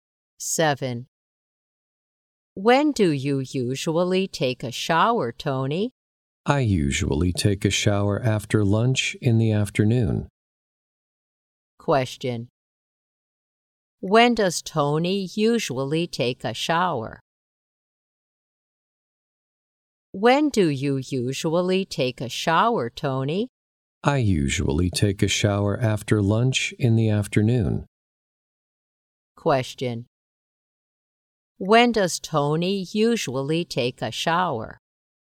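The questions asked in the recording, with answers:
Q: When does Tony usually take a shower?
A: After lunch in the afternoon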